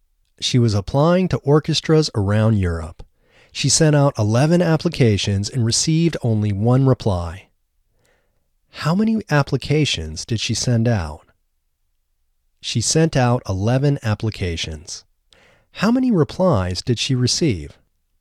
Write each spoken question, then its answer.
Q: How many applications did she send out?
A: She sent out 11 applications.